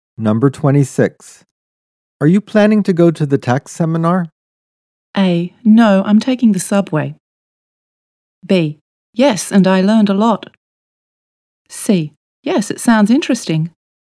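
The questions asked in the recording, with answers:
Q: Are you planning to go to the tax seminar?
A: C: Yes, it sounds interesting.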